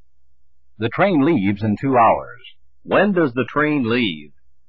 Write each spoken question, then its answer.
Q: When does the train leave?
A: This train leaves in 2 hours.